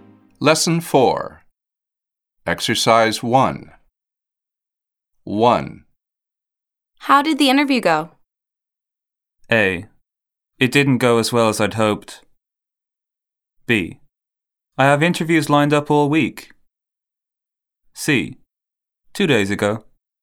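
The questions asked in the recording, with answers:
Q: How did the interview go?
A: A: It didn't go as well as I'd hoped.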